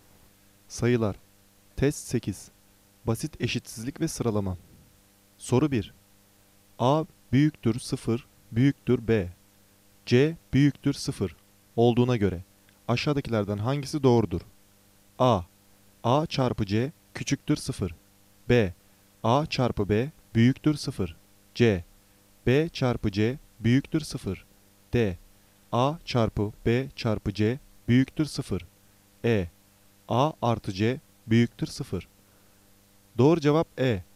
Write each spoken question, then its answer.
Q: A büyüktür 0 büyüktür B C büyüktür 0 olduğuna göre aşağıdakilerden hangisi doğrudur?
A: Doğru cevap E.